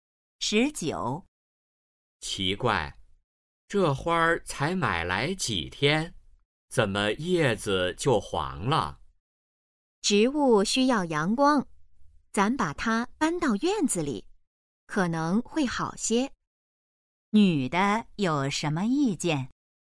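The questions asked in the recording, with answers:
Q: 女的有什么意见?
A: 把花搬到院子里晒太阳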